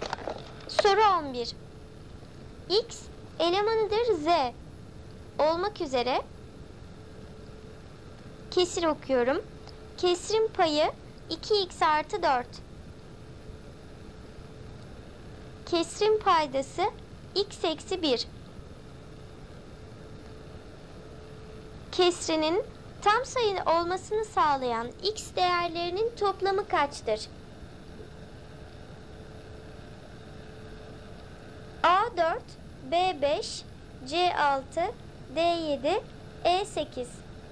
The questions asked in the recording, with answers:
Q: Kesrinin tam sayı olmasını sağlayan x değerlerinin toplamı kaçtır?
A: Doğru cevap E 8.